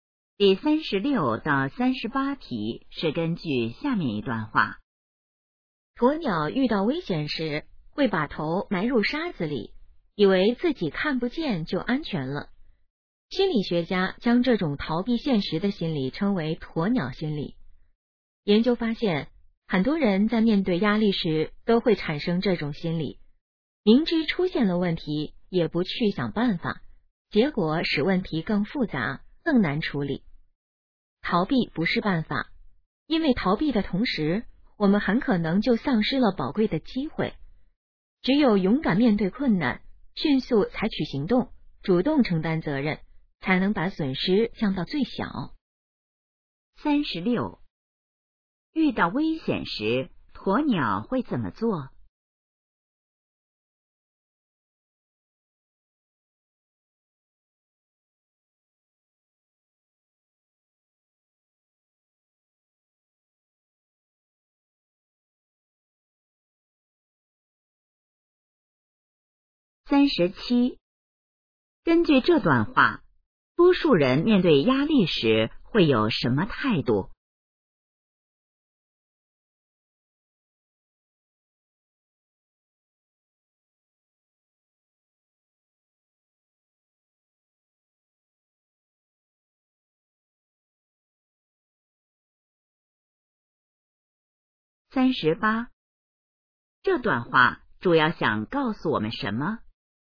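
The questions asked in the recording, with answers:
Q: 遇到危险时,鸵鸟会怎么做?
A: 把头埋入沙子里

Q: 根据这段话,多数人面对压力时会有什么态度?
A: 逃避

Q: 这段话主要想告诉我们什么?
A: 要勇敢面对困难,不要逃避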